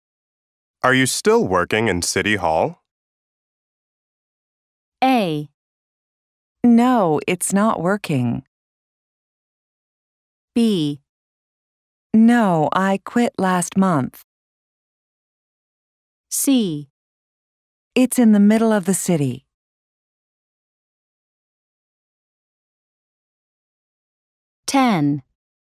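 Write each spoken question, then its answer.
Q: Are you still working in City Hall?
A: B: No, I quit last month.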